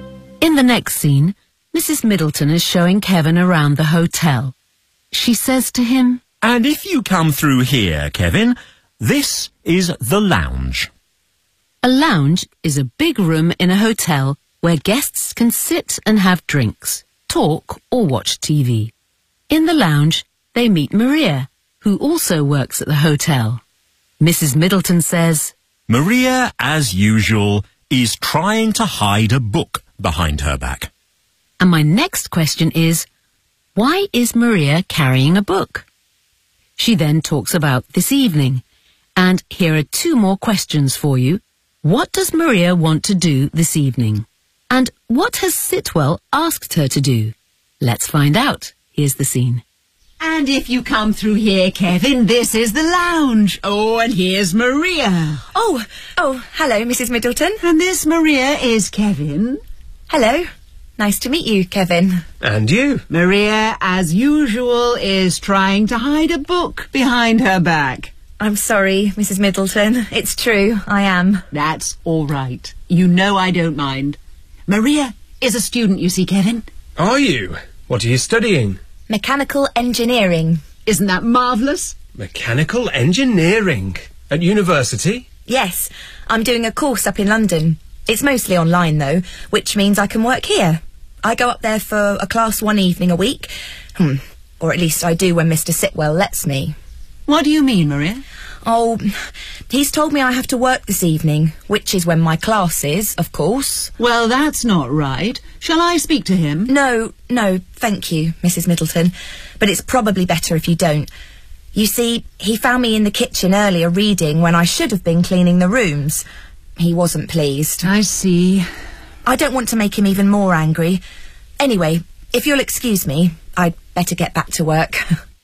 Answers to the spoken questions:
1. Because she's a student.
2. She wants to go to her class in London.
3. He's told her she has to work this evening.